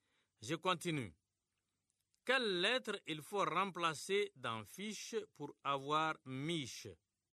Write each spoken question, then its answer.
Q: Quelle lettre il faut remplacer dans fiche pour avoir miche?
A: Monsieur, c'est la lettre F.